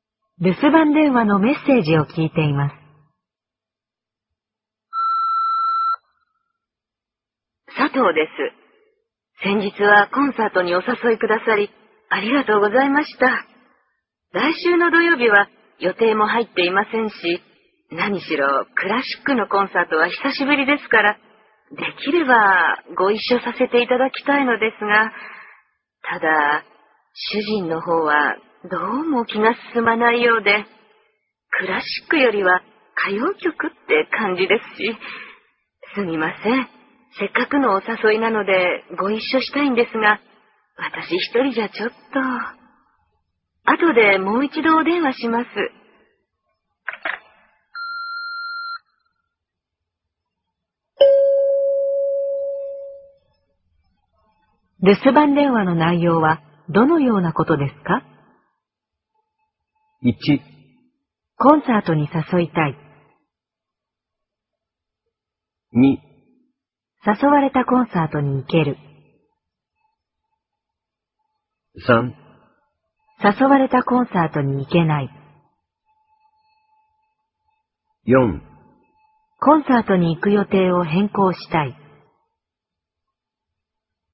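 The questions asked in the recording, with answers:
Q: 留守番電話の内容はどのようなことですか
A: 3: 誘われたコンサートに行けない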